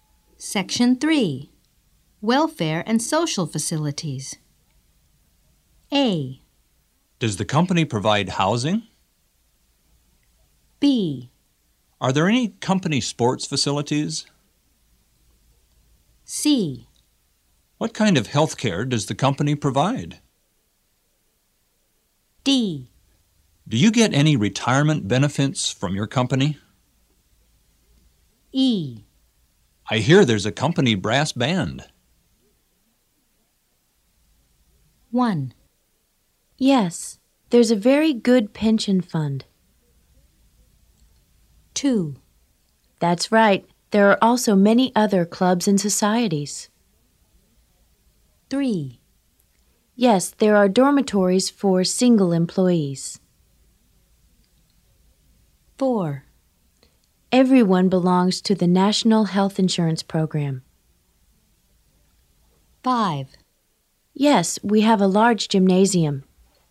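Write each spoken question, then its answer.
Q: Yes, there's a very good pension fund.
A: D: Do you get any retirement benefits from your company?

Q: That's right. There are also many other clubs and societies.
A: E: I hear there's a company brass band.

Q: Yes, there are dormitories for single employees.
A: A: Does the company provide housing?

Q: Everyone belongs to the National Health Insurance Program.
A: C: What kind of health care does the company provide?

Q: Yes, we have a large gymnasium.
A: B: Are there any company sports facilities?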